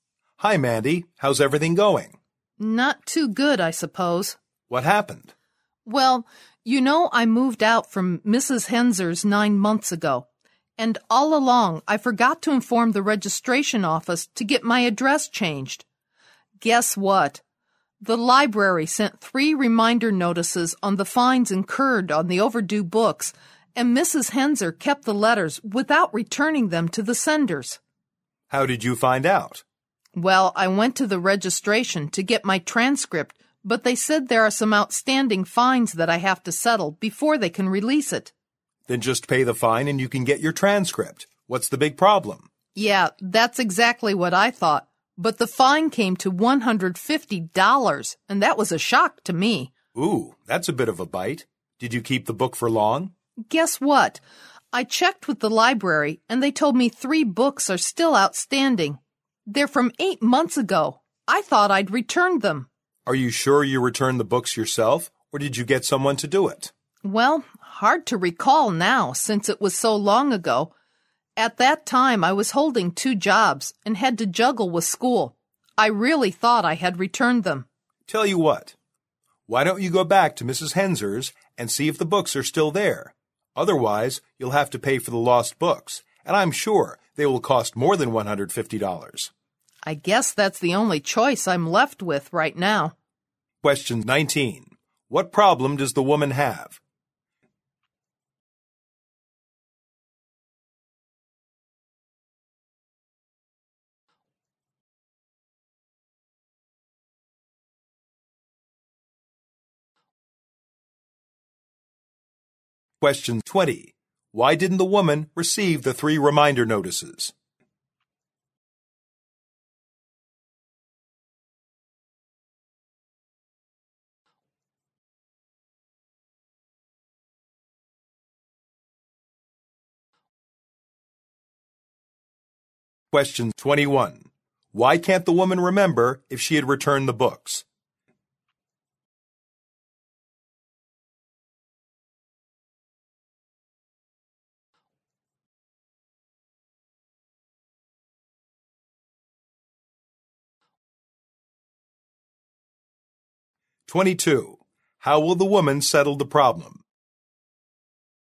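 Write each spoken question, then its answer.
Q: What problem does the woman have?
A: She has $150 in overdue library fines, so she can't get her transcript.

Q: Why didn't the woman receive the 3 reminder notices?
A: She moved and didn't change her address, and Mrs. Henser kept the letters.

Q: Why can't the woman remember if she had returned the books?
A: It was long ago and she was busy with two jobs and school.

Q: How will the woman settle the problem?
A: She will go back to Mrs. Henser's to look for the books.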